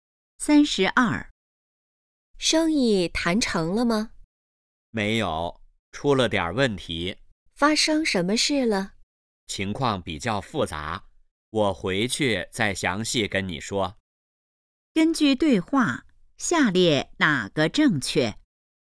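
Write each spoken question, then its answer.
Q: 根据对话,下列哪个正确?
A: 生意没谈成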